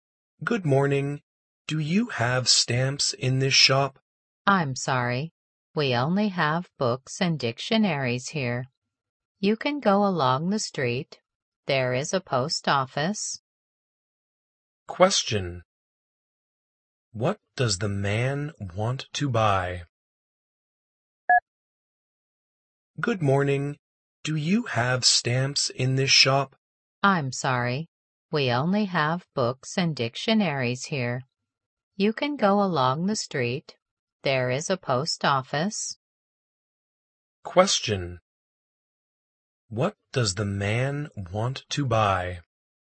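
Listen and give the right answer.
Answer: Stamps.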